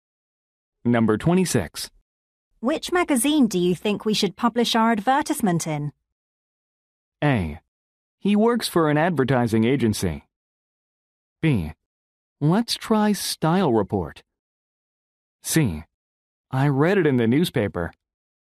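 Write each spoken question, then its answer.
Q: Which magazine do you think we should publish our advertisement in?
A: B: Let's try Style Report.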